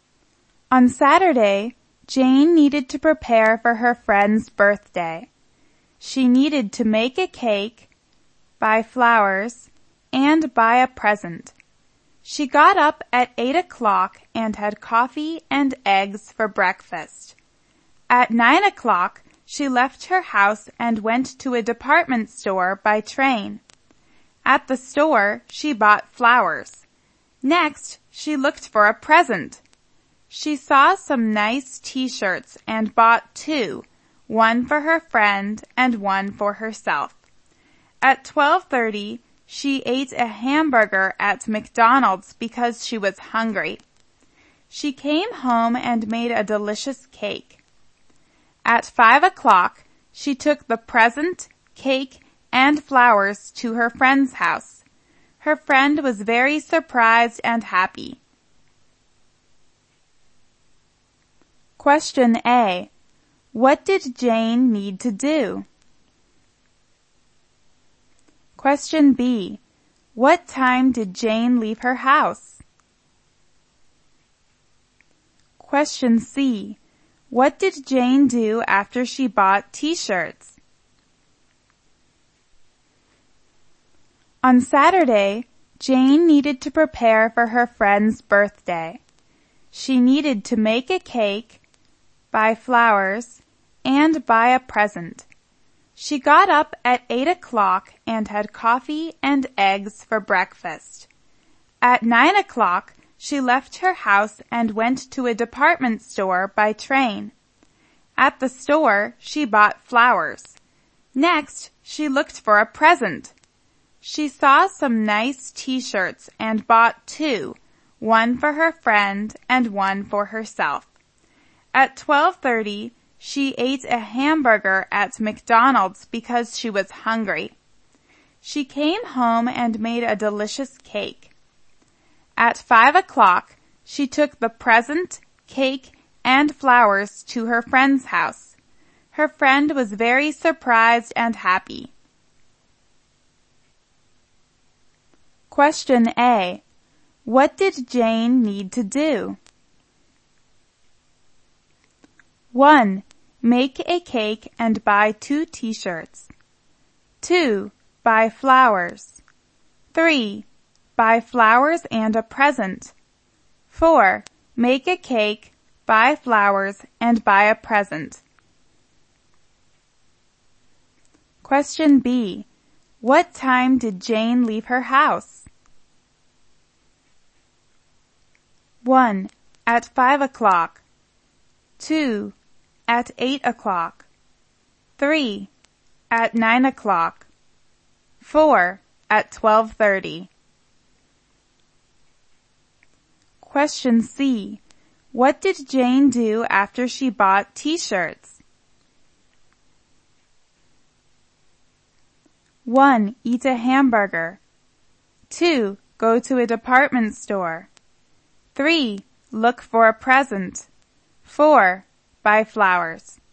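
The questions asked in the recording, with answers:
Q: What did Jane need to do?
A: 4: Make a cake, buy flowers, and buy a present.

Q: What time did Jane leave her house?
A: 3: At 9 o'clock.

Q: What did Jane do after she bought T-shirts?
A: 1: Eat a hamburger.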